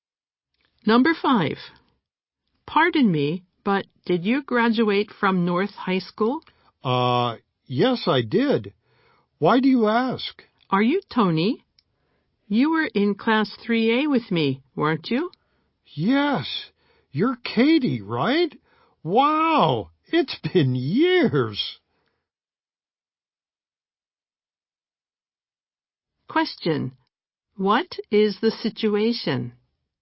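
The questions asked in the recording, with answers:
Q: Question. What is the situation?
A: Two former classmates meet again after many years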